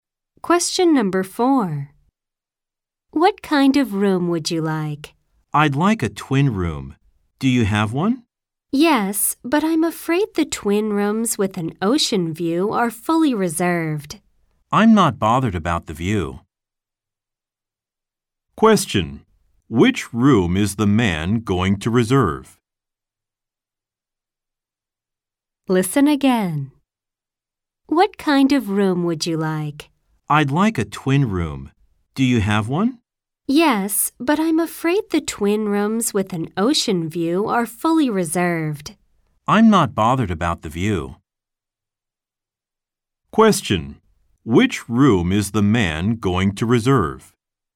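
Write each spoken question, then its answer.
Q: Which room is the man going to reserve?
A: A twin room without an ocean view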